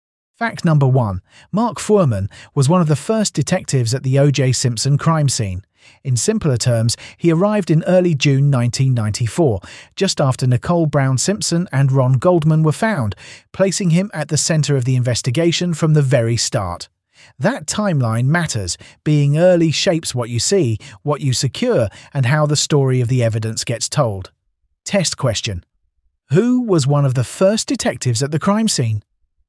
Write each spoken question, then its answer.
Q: Who was one of the first detectives at the crime scene?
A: Correct answer. Mark Fuhrman.